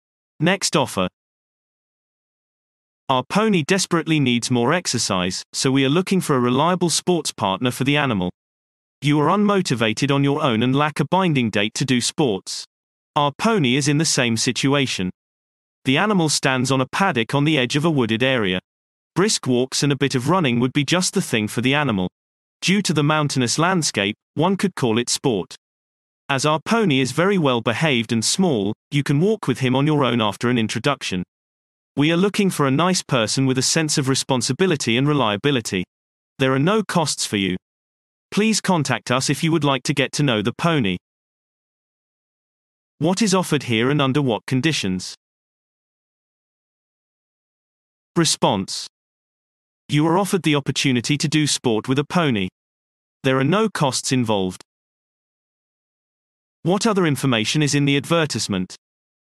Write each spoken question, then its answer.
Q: What other information is in the advertisement?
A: The pony urgently needs more exercise.